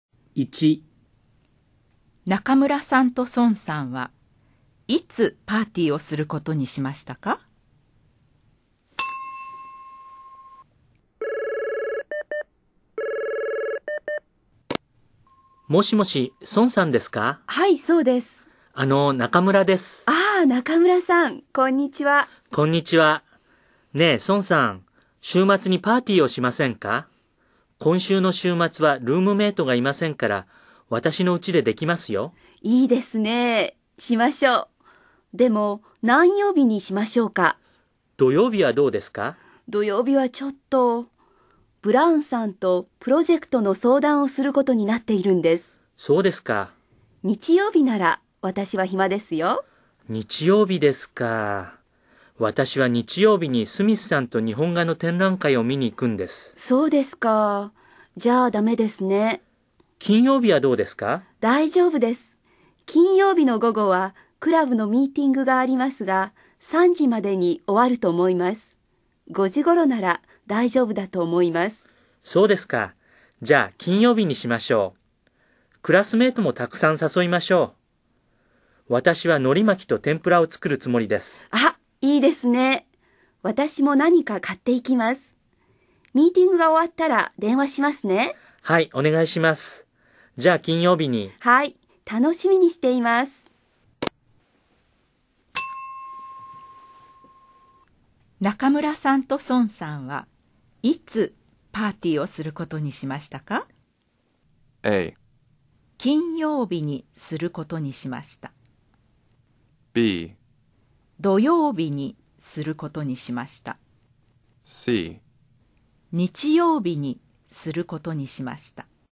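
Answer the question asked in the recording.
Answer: A: 金曜日にすることにしました。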